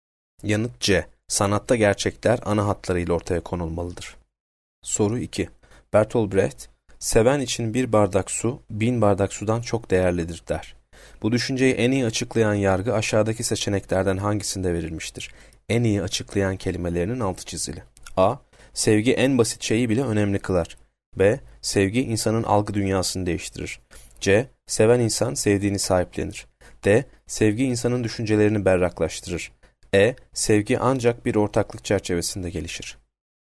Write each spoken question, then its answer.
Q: Bu düşünceyi en iyi açıklayan yargı aşağıdaki seçeneklerden hangisinde verilmiştir?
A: Yanıt A. Sevgi en basit şeyi bile önemli kılar.